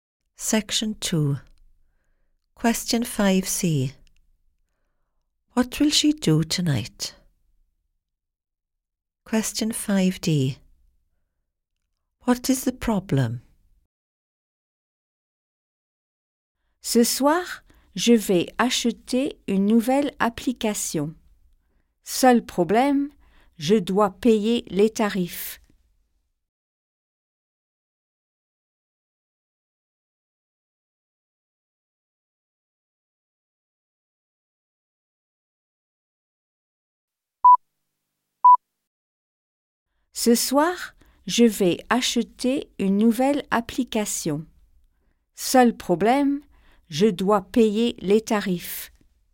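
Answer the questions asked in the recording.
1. Buy a new app
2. She has to pay the charges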